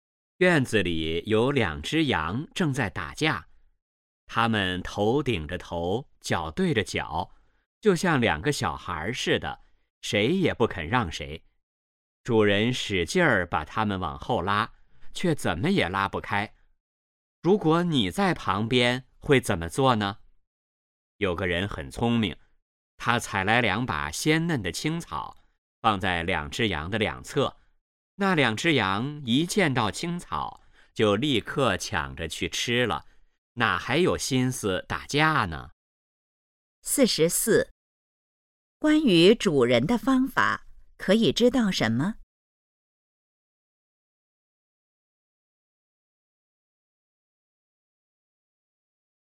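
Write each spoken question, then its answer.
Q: 那两只羊看见青草后是什么反应?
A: 立刻抢着去吃,不打架了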